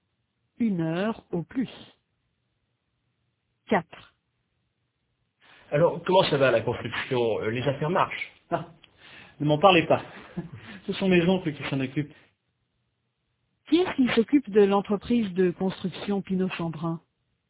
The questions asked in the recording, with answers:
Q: Qui est-ce qui s'occupe de l'entreprise de construction Pinot-Chambrun?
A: Les oncles d'Hubert.